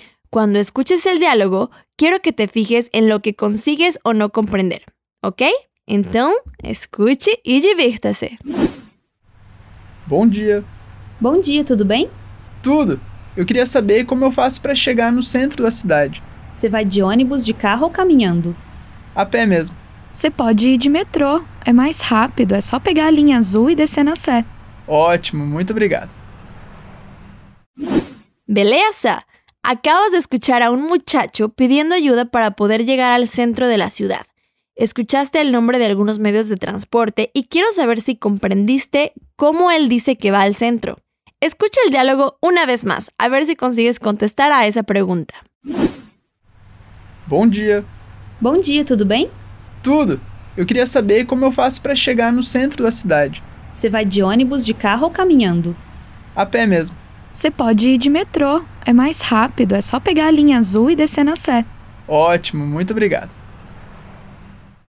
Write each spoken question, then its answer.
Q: quiero saber si comprendiste cómo él dice que va al centro.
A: A pé mesmo, que significa voy a pie.